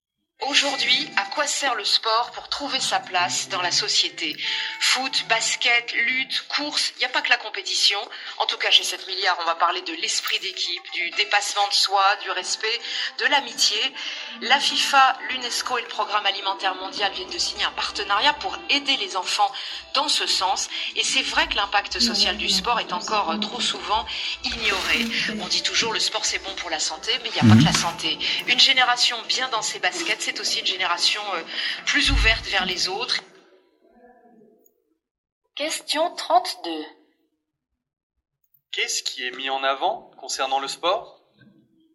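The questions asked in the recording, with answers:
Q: Qu'est-ce qui est mis en avant concernant le sport ?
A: Son impact social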